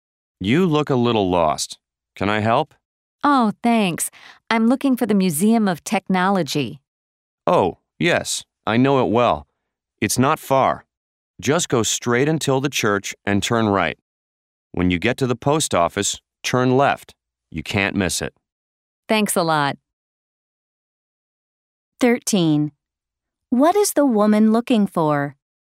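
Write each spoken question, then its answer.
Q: What is the woman looking for?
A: The Museum of Technology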